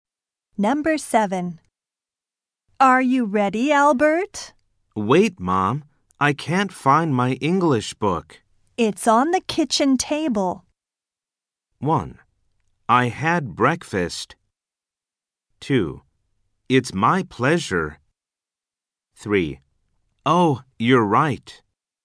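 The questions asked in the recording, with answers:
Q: It's on the kitchen table.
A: 3: Oh, you're right.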